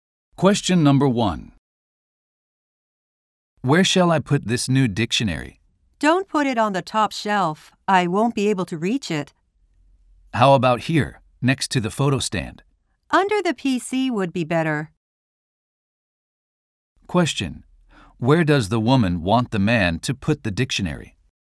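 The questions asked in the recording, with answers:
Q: Where does the woman want the man to put the dictionary?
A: Under the PC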